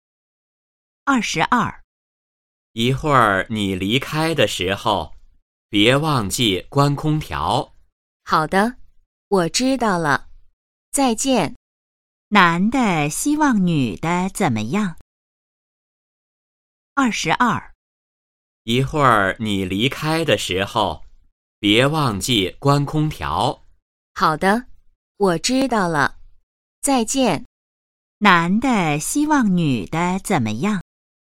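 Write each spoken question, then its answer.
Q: 男的希望女的怎么样?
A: 离开的时候关空调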